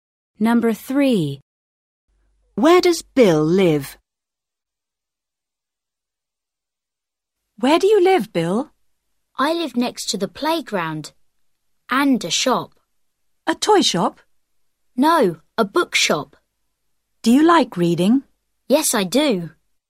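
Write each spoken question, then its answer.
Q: Where does Bill live?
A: Next to the playground and a bookshop.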